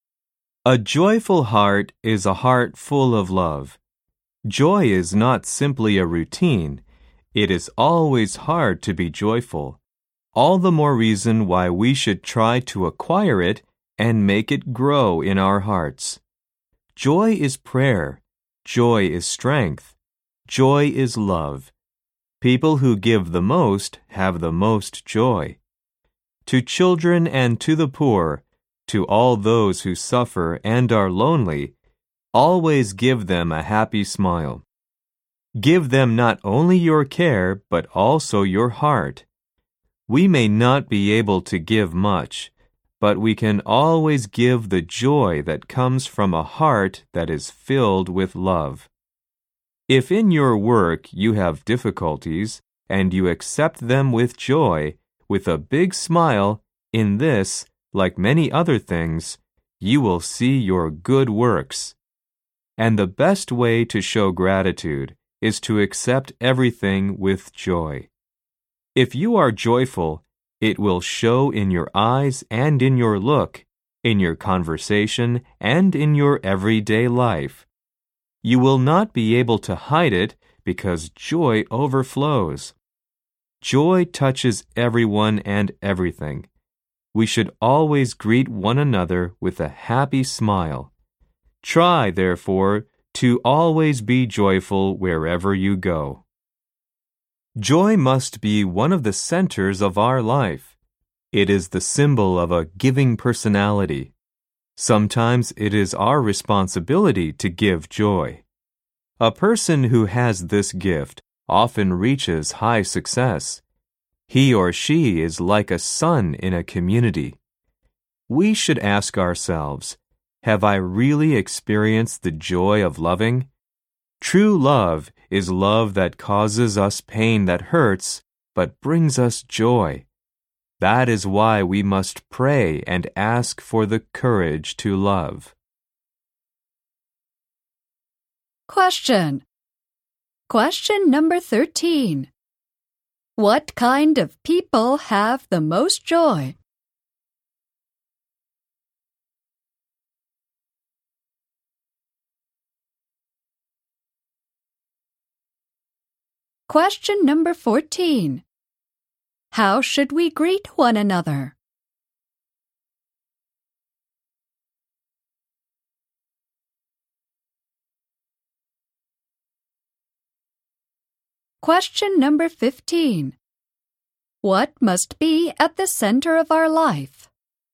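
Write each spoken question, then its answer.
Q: What kind of people have the most joy?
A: People who give the most.

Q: How should we greet one another?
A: With a happy smile.

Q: What must be at the center of our life?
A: Joy.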